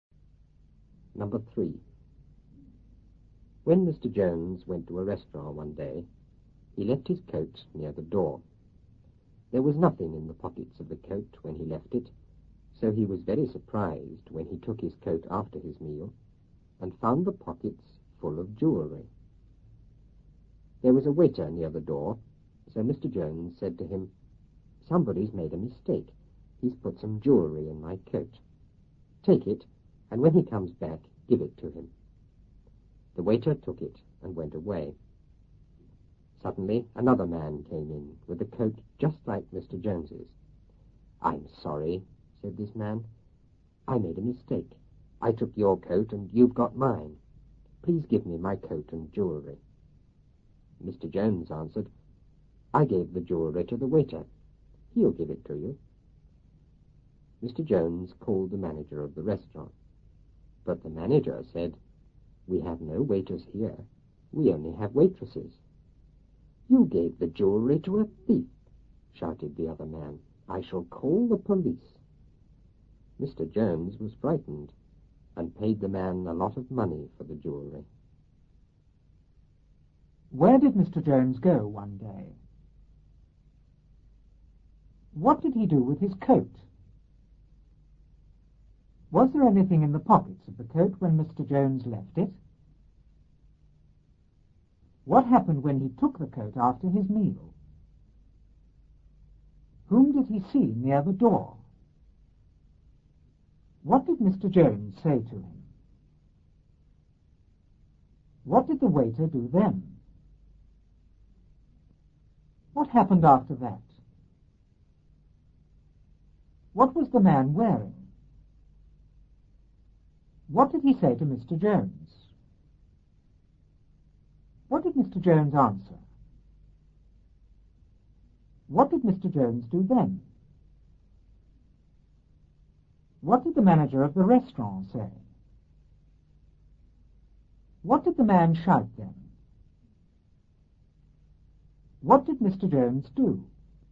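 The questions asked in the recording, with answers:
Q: Where did Mr. Jones go one day?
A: To a restaurant

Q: What did he do with his coat?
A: He left it near the door

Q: Was there anything in the pockets of the coat when Mr. Jones left it?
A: No, there was nothing

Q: What happened when he took the coat after his meal?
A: He found the pockets full of jewellery

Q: Whom did he see near the door?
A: A waiter

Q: What did Mr. Jones say to him?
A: Somebody's made a mistake and put jewellery in my coat; take it and give it to him when he comes back

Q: What did the waiter do then?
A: He took the jewellery and went away

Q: What happened after that?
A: Another man came in with a coat just like Mr. Jones's

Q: What was the man wearing?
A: A coat just like Mr. Jones's

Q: What did he say to Mr. Jones?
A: He had taken Mr. Jones's coat by mistake and wanted his coat and jewellery back

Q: What did Mr. 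Jones answer?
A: He gave the jewellery to the waiter, who would give it to him

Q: What did Mr. Jones do then?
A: He called the manager of the restaurant

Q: What did the manager of the restaurant say?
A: They have no waiters, only waitresses

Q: What did the man shout then?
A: You gave the jewellery to a thief; I shall call the police

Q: What did Mr. Jones do?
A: He was frightened and paid the man a lot of money for the jewellery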